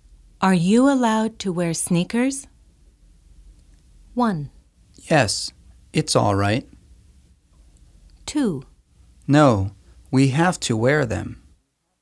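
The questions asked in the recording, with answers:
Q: Are you allowed to wear sneakers?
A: 1: Yes, it's all right.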